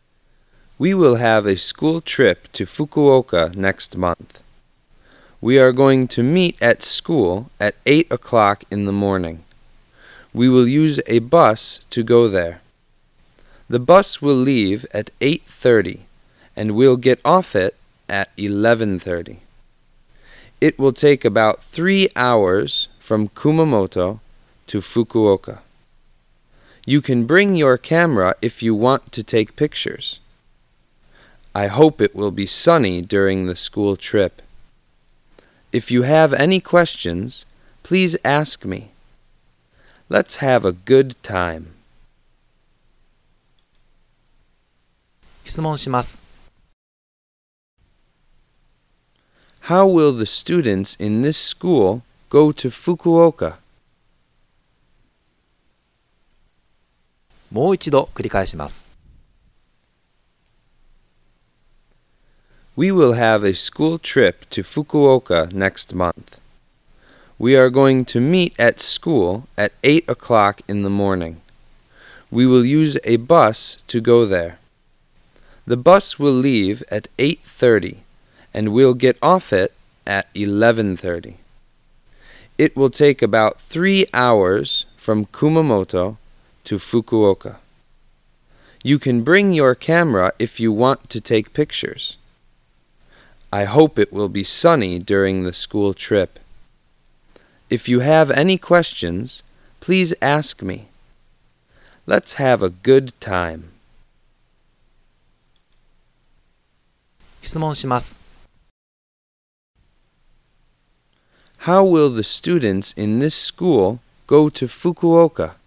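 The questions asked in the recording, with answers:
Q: How will the students in this school go to Fukuoka?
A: By bus.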